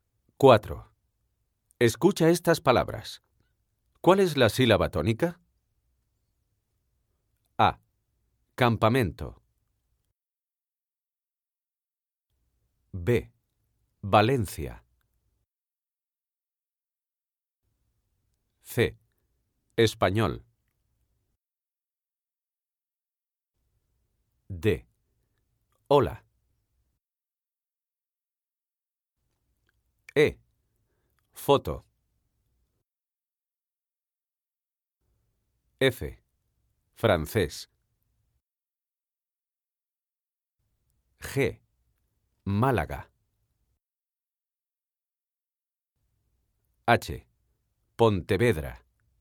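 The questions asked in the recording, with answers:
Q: ¿Cuál es la sílaba tónica? A. Campamento.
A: men

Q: B. Valencia.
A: len

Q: C. Español.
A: ñol

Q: D. Hola.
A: ho

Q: E. Foto.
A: fo

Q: F. Francés.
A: cés

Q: G. Málaga.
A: Má

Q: H. Pontevedra.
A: ve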